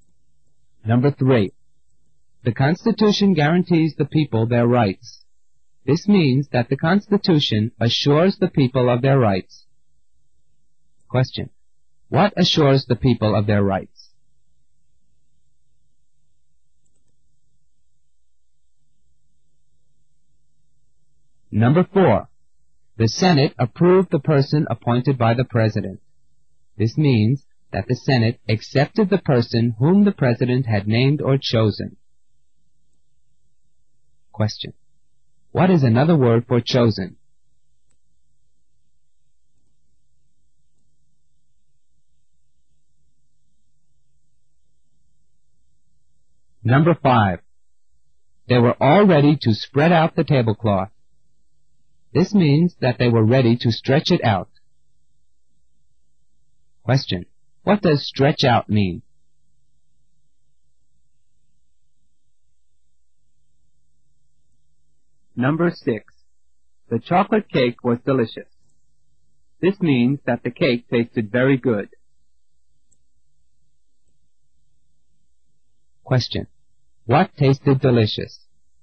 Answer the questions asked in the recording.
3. For number 3, the correct answer is A, the Constitution.
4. The answer to number 4 is C, appointed.
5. For number 5, the answer is B, spread out.
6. For number 6, the answer is A, the cake.